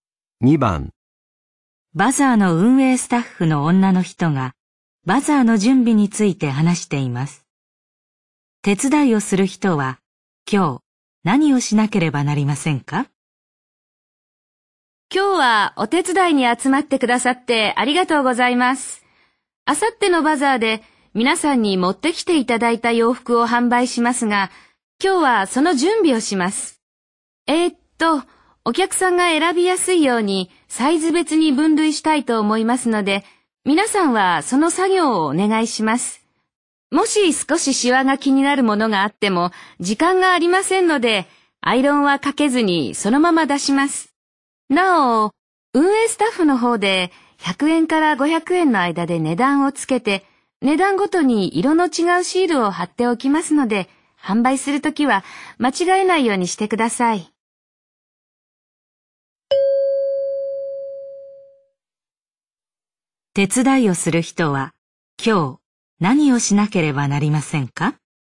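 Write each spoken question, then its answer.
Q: 手伝いをする人は今日何をしなければなりませんか?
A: 洋服をサイズ別に分類する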